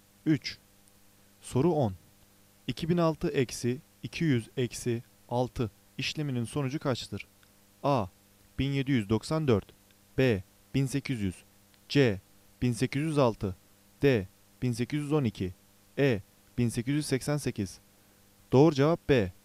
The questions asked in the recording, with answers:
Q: 2006 eksi 200 eksi 6 işleminin sonucu kaçtır?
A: Doğru cevap B. 1800